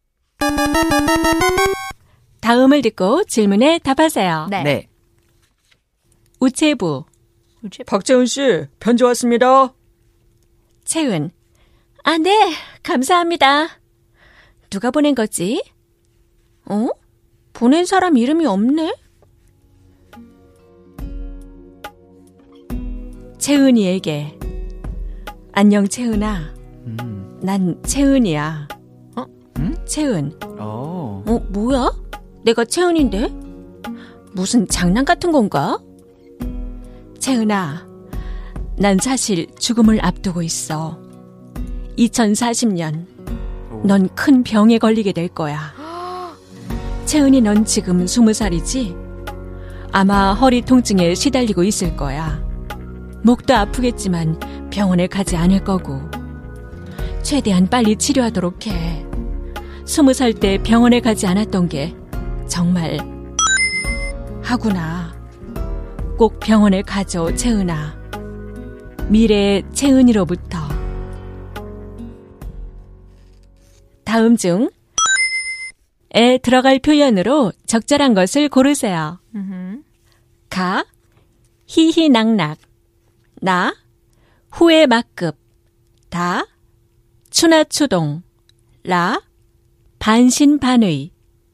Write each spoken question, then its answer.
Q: 다음 중 에 들어갈 표현으로 적절한 것을 고르세요.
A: Okay, so the official answer is 나 후회 막급.